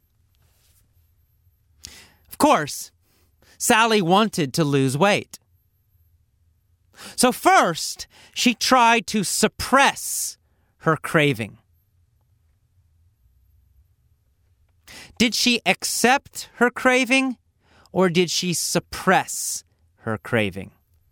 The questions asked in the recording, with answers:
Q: Did she accept her craving, or did she suppress her craving?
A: Well, she tried to suppress it.